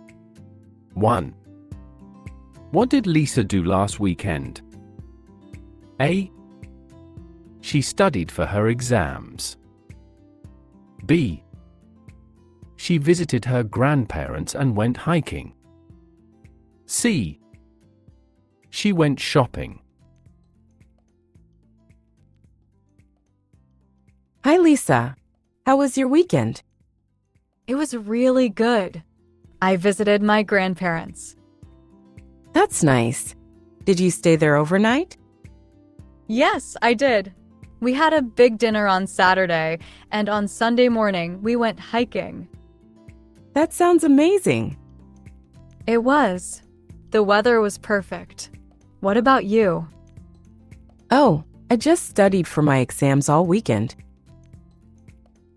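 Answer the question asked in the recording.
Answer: B: She visited her grandparents and went hiking.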